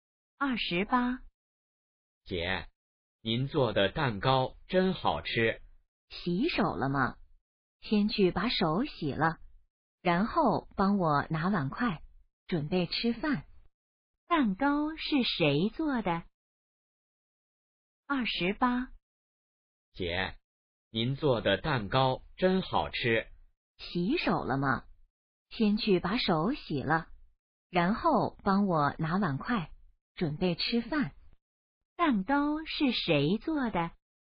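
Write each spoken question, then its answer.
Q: 蛋糕是谁做的?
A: 姐姐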